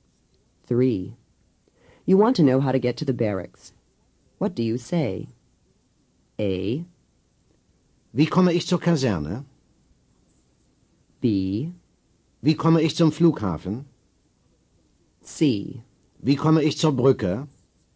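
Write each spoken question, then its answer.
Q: You want to know how to get to the barracks. What do you say?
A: A: Wie komme ich zur Kaserne?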